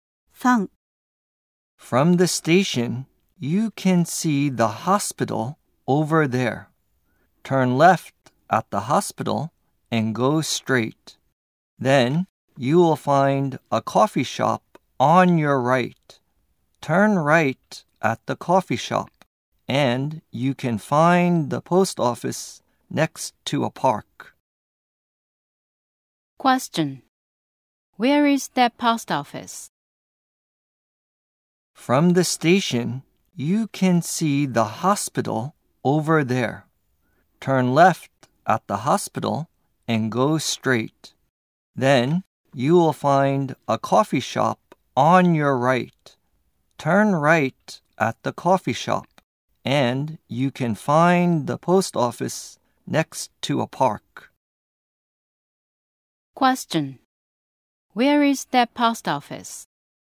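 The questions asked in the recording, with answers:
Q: Question: Where is that post office?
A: Next to a park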